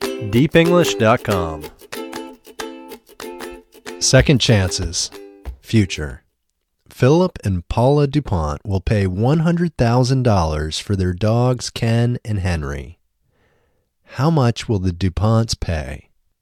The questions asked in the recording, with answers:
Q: How much will the DuPonts pay?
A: The DuPonts will pay $100,000.